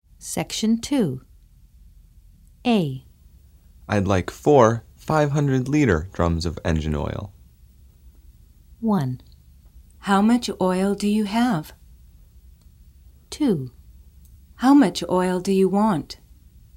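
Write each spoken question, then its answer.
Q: I'd like 4 500-liter drums of engine oil.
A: 2: How much oil do you want?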